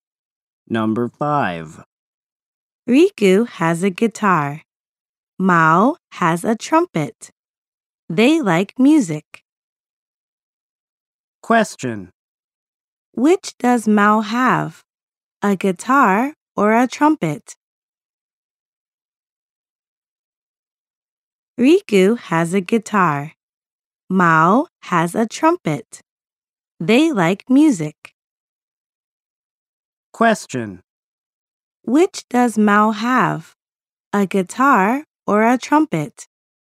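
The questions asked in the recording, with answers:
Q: Which does Mao have? A guitar or a trumpet?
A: A trumpet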